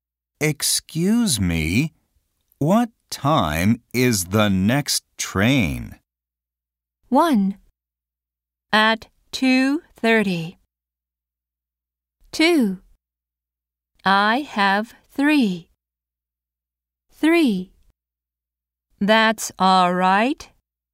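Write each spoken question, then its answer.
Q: Excuse me, what time is the next train?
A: 1: At 2:30.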